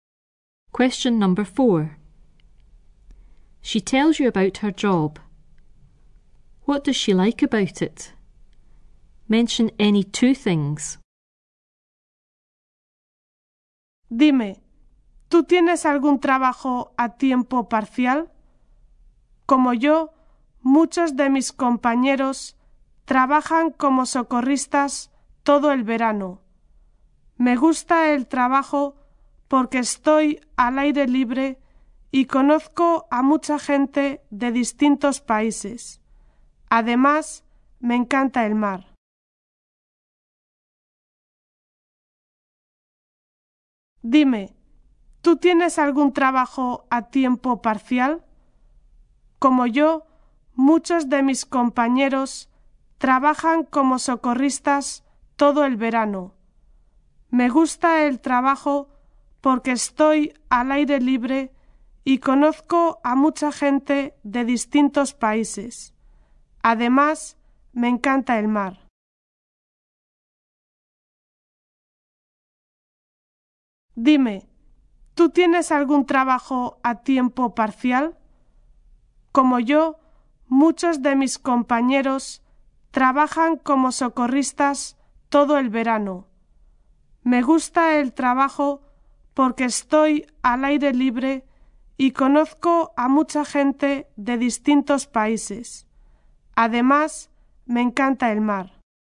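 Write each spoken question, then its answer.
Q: What does she like about it?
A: She is outdoors, meets people from different countries, loves the sea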